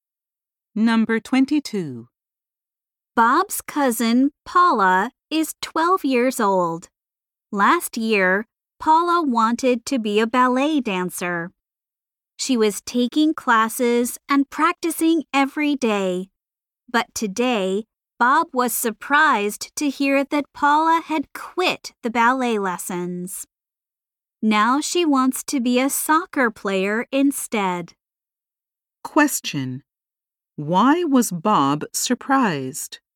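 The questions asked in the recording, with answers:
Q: Why was Bob surprised?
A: Paula had quit ballet lessons.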